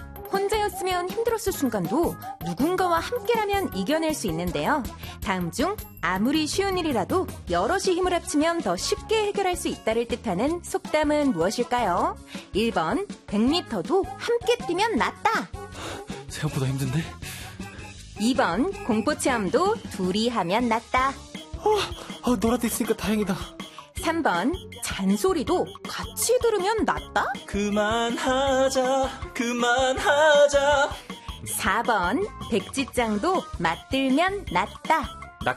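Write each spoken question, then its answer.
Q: 다음 중 아무리 쉬운 일이라도 여럿이 힘을 합치면 더 쉽게 해결할 수 있다를 뜻하는 속담은 무엇일까요?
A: 4: 백지장도 맞들면 낫다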